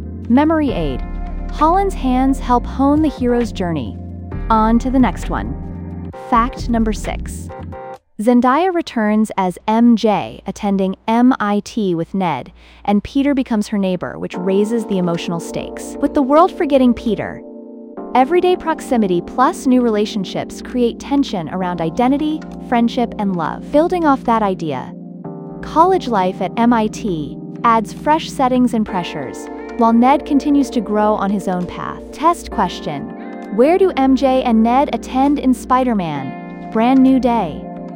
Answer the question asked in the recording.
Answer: MIT.